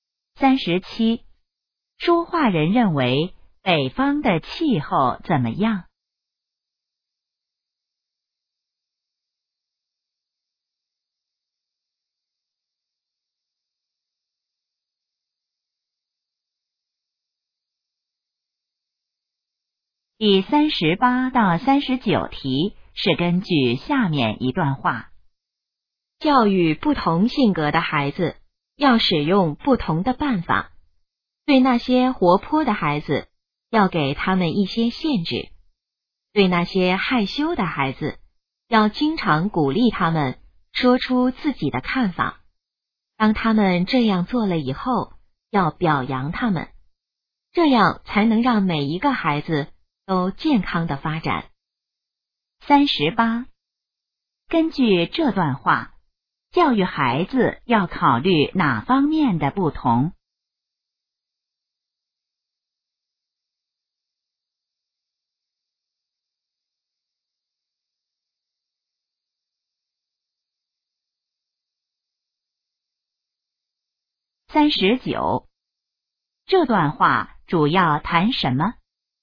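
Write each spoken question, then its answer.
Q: 根据这段话,教育孩子要考虑哪方面的不同?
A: 性格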